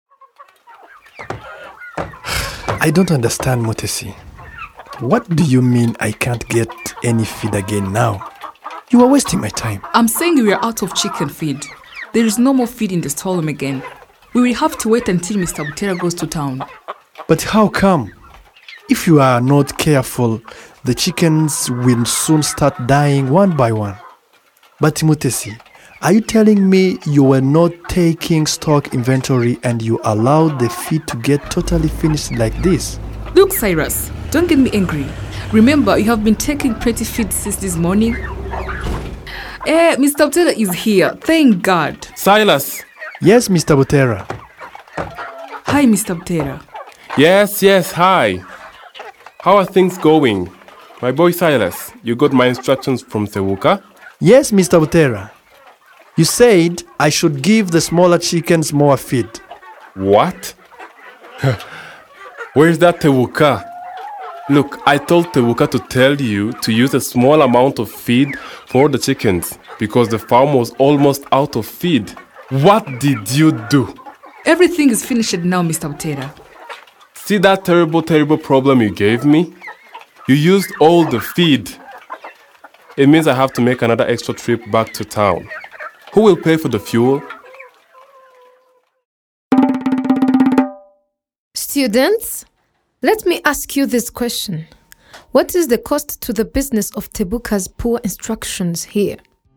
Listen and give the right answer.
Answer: Maybe you said the cost to Mr.